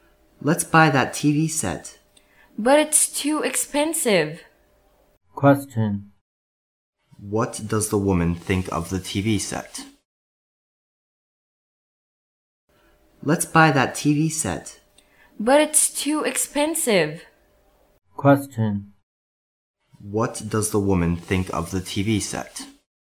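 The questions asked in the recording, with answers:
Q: What does the woman think of the TV set?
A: It's too expensive.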